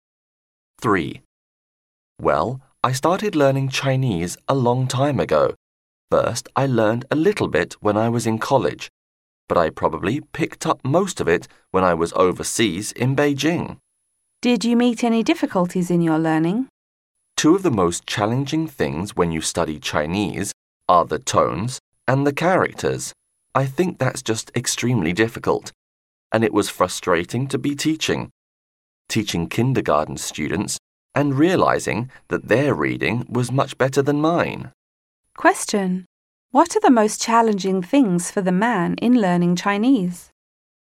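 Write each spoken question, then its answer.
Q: What are the most challenging things for the man in learning Chinese?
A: The tones and the characters.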